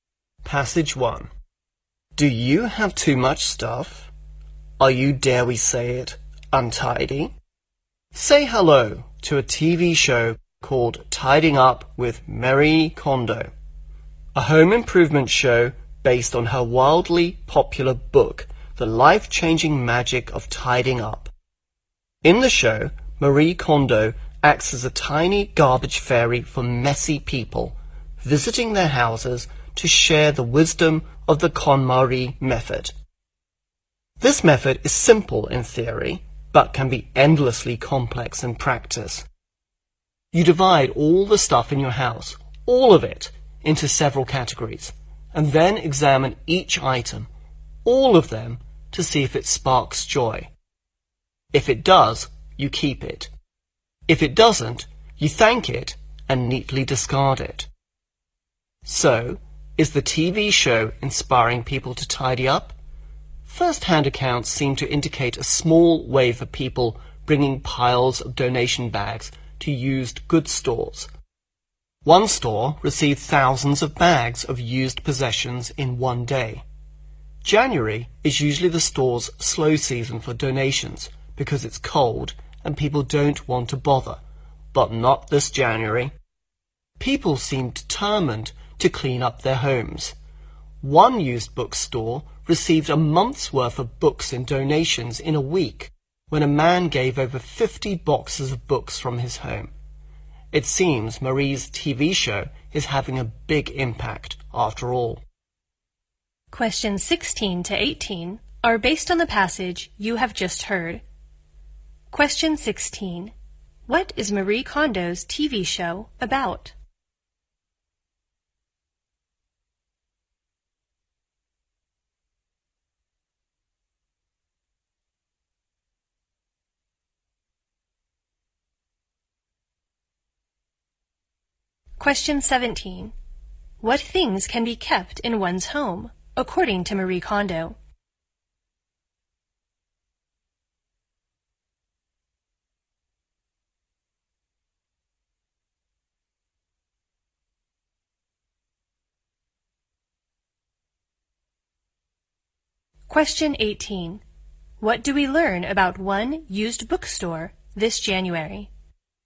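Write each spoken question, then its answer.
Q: What is Marie Kondo's TV show about?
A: Home improvement: helping messy people tidy up

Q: What things can be kept in one's home, according to Marie Kondo?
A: Things that spark joy

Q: What do we learn about one used bookstore this January?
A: It received a month's worth of books in a week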